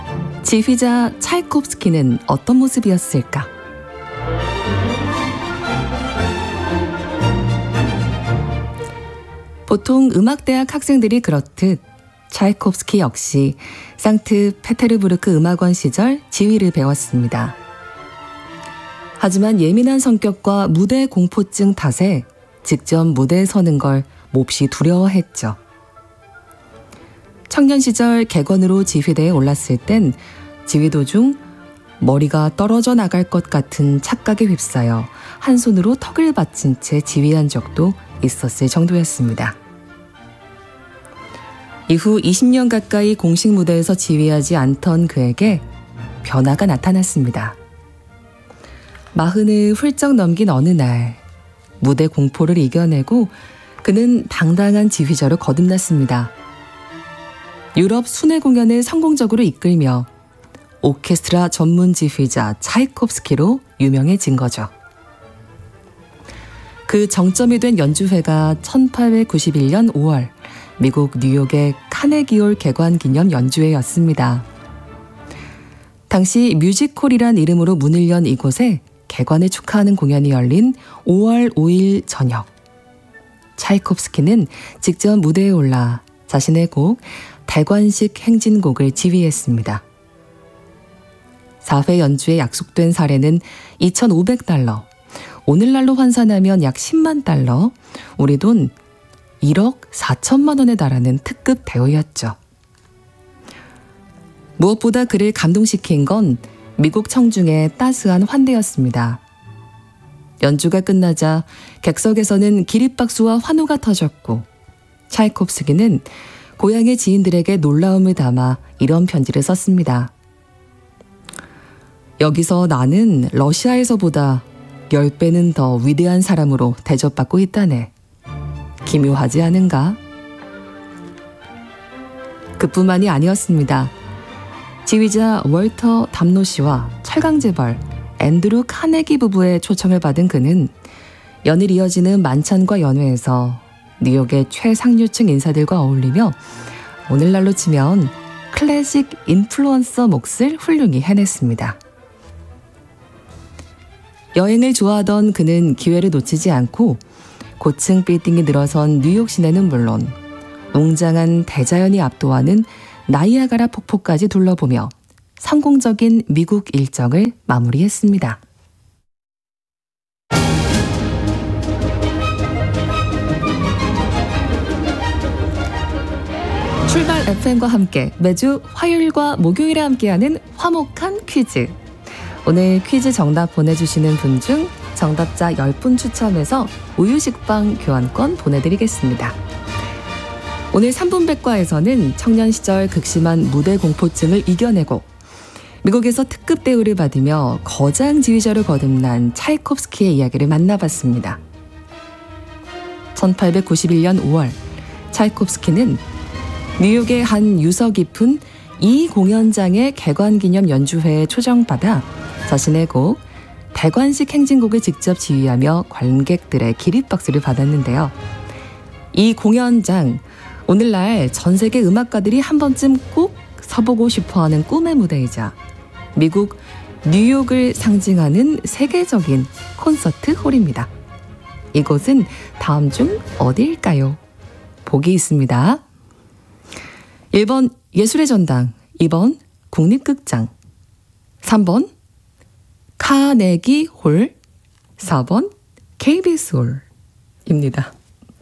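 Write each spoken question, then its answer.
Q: 이곳은 다음 중 어디일까요?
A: 3번: 카네기 홀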